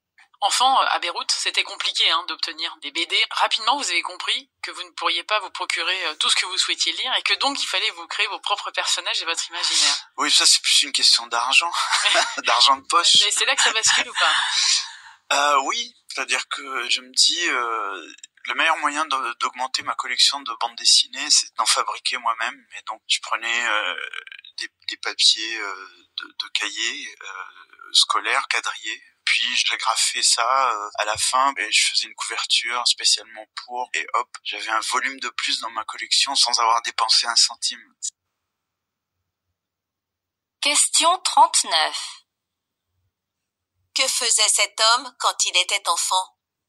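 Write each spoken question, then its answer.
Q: Que faisait cet homme quand il était enfant ?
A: Il fabriquait lui-même ses propres bandes dessinées.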